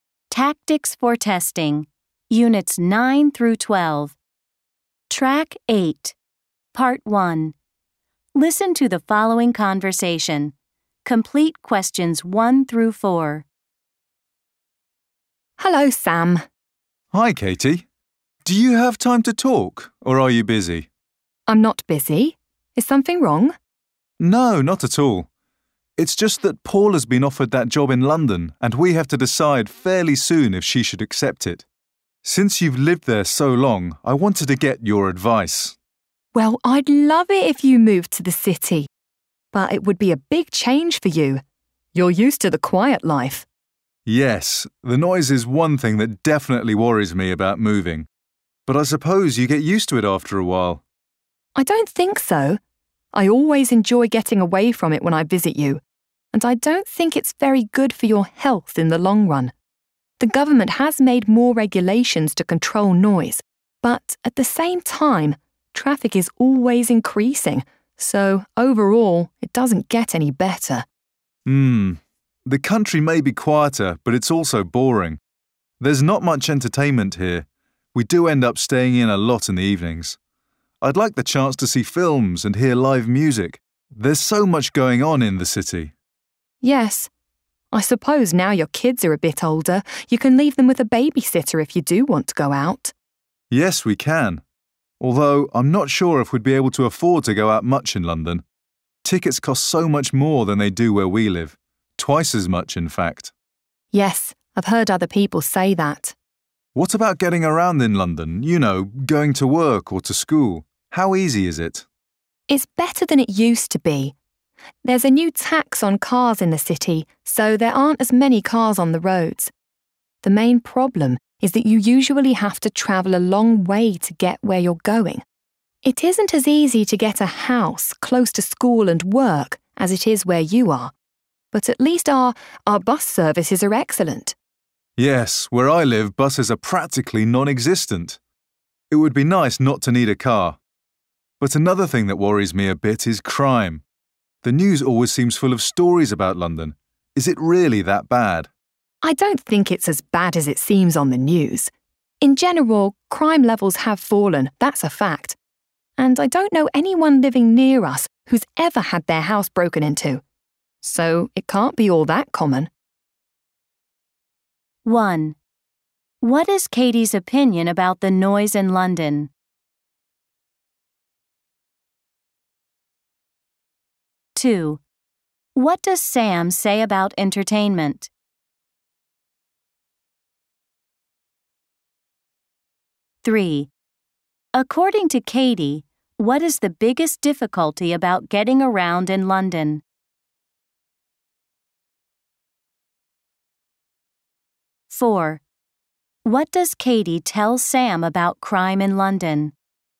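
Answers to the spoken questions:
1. It's bad for your health in the long run, and it isn't getting any better because traffic keeps increasing
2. There's not much entertainment where he lives; he'd like the chance to see films and hear live music in the city
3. You usually have to travel a long way to get where you're going
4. It isn't as bad as it seems on the news; crime levels have fallen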